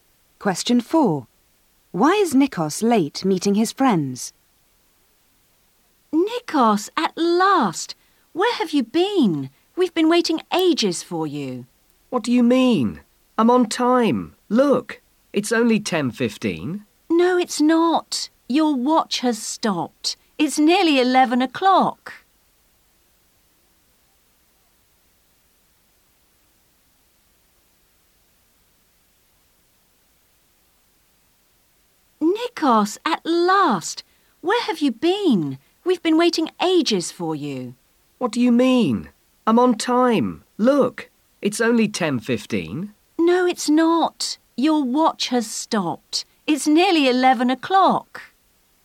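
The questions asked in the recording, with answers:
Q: Why is Nikos late meeting his friends?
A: His watch has stopped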